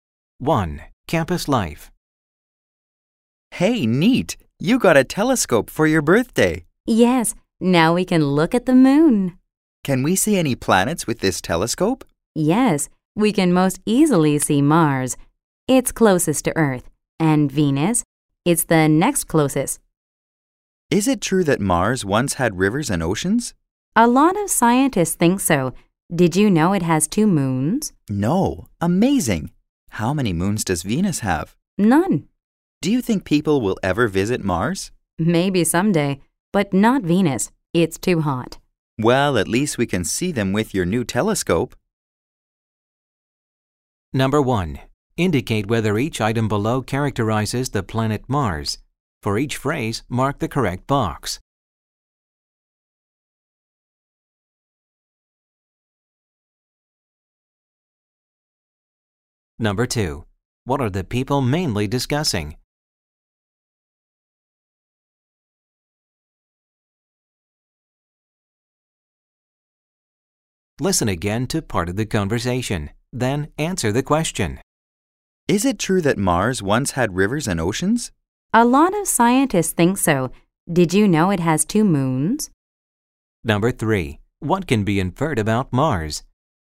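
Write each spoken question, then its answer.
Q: What are the people mainly discussing?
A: The planets Mars and Venus, which they can see with a new telescope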